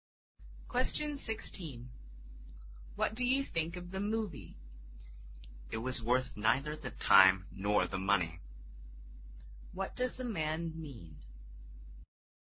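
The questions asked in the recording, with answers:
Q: What does the man mean?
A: The movie was a waste of time and money.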